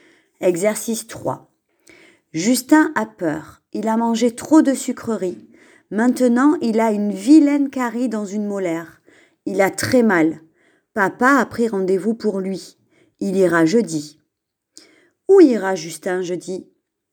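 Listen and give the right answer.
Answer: Chez le dentiste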